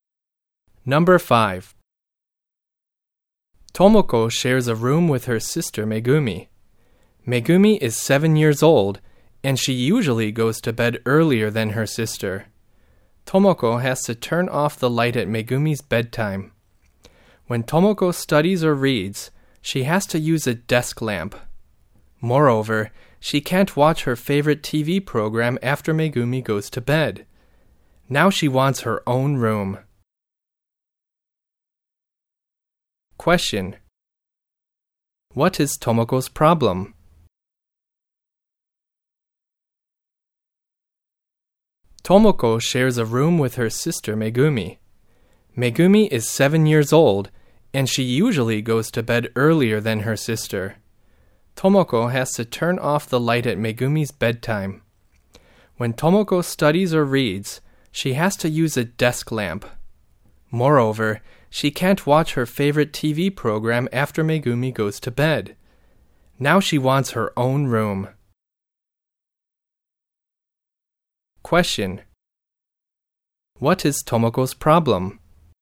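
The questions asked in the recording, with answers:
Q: What is Tomoko's problem?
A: She shares a room with her younger sister, so she must turn off the light at her sister's bedtime and can't watch TV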